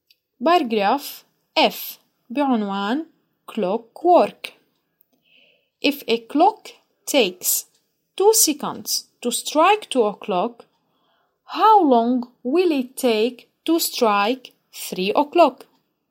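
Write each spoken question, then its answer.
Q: If a clock takes 2 seconds to strike 2 o'clock, how long will it take to strike 3 o'clock?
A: 4 seconds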